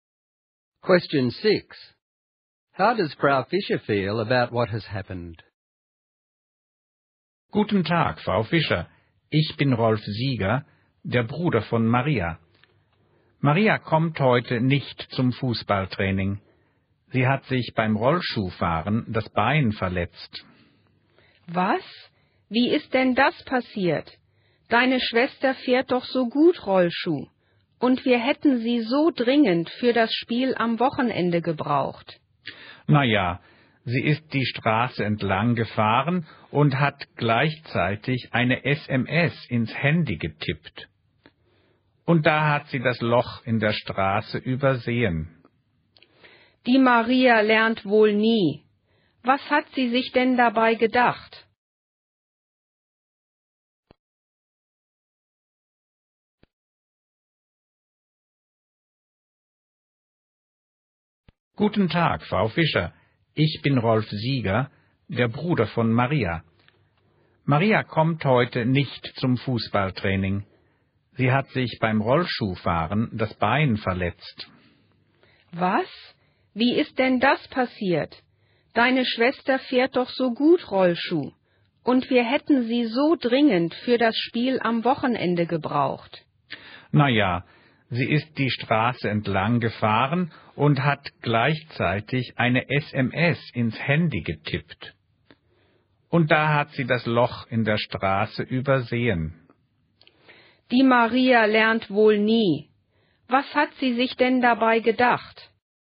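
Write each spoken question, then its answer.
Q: How does Frau Fischer feel about what has happened?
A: Annoyed and disappointed: Maria was careless by texting while skating and is now missing when the team needs her for the weekend game.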